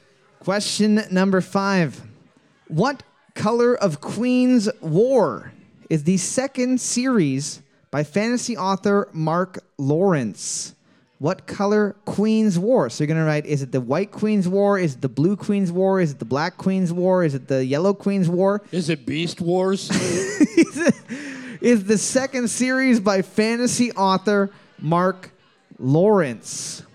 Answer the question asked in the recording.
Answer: You're looking for the Red Queen's War.